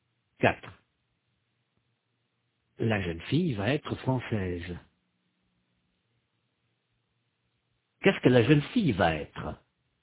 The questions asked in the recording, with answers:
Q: Qu'est-ce que la jeune fille va être?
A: Française. Elle va être française.